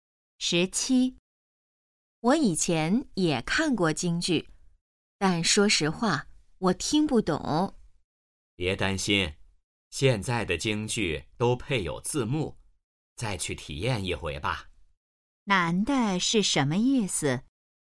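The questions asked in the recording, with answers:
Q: 男的是什么意思?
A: 建议再去看一次京剧,现在有字幕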